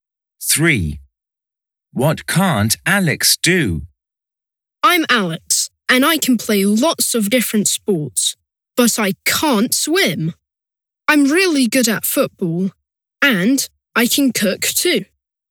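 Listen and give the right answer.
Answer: swim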